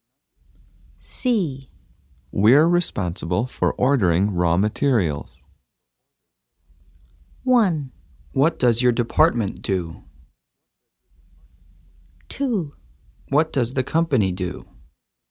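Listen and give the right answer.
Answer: 1: What does your department do?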